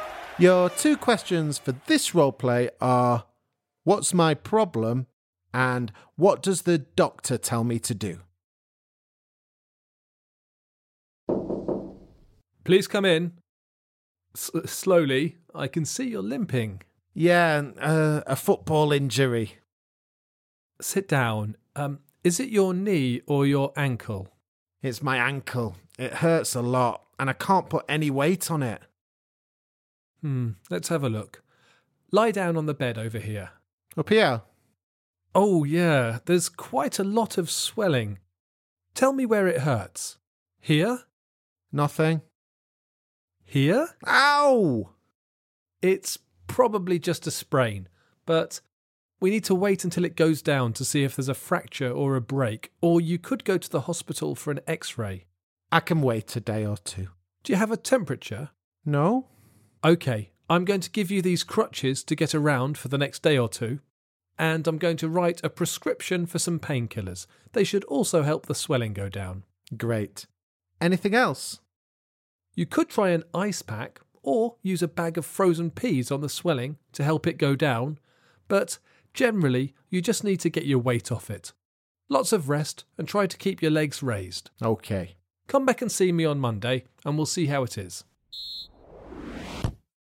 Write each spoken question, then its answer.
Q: what does the doctor tell me to do?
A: I gave him some crutches, some painkillers, and told him to rest and come back in a few days.